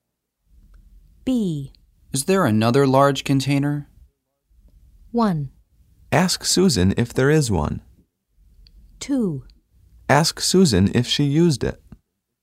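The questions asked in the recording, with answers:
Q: Is there another large container?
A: 1: Ask Susan if there is one.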